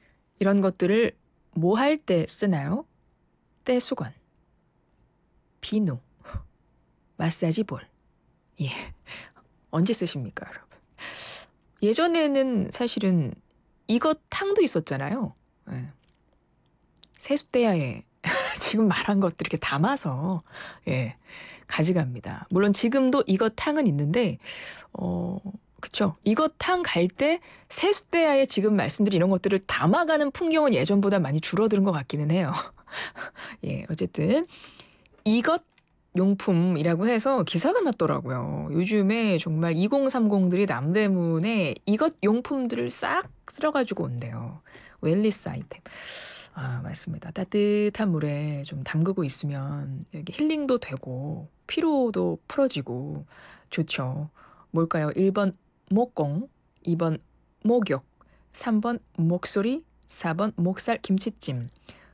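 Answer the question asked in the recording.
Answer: 2번: 목욕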